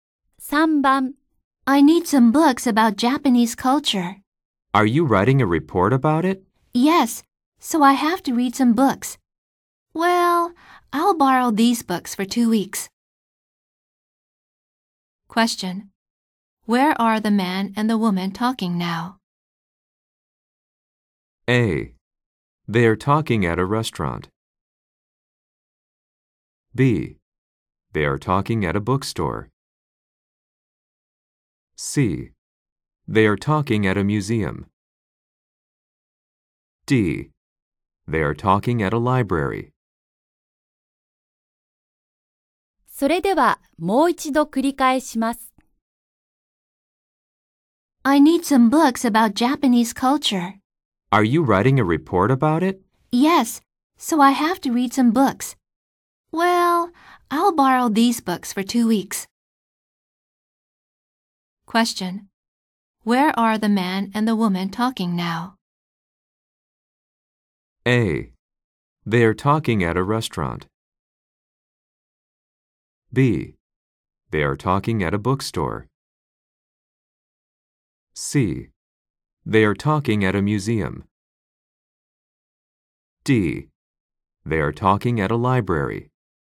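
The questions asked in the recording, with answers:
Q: Where are the man and the woman talking now?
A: D: They are talking at a library.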